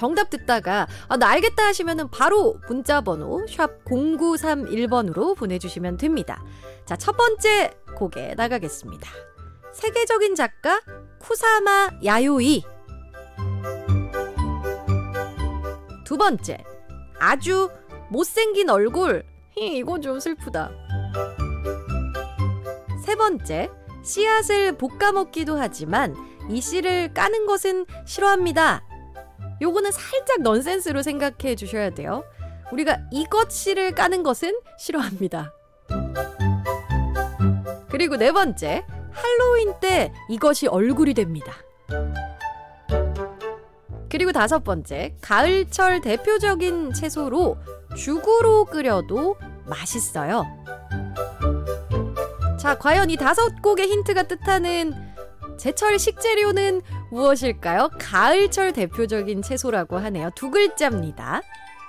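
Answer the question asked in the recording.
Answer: 호박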